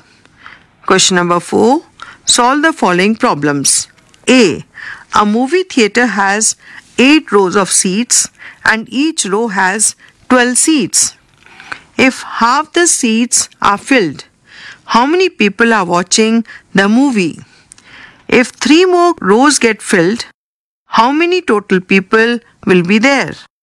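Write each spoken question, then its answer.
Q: If half the seats are filled, how many people are watching the movie?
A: 48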